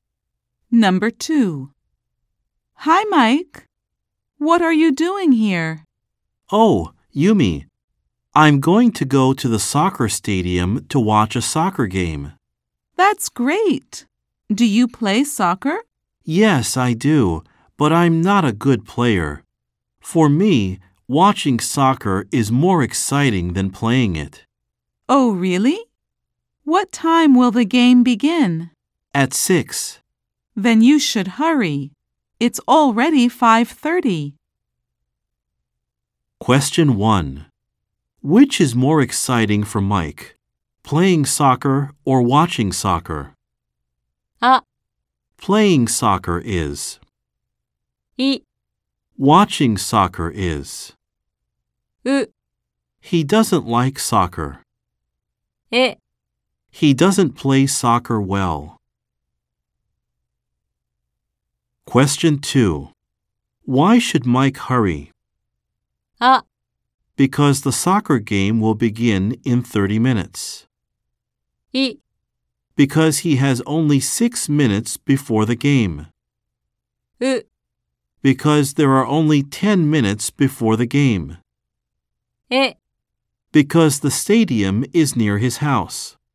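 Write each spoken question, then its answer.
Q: Which is more exciting for Mike, playing soccer or watching soccer?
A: い: Watching soccer is.

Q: Why should Mike hurry?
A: あ: Because the soccer game will begin in 30 minutes.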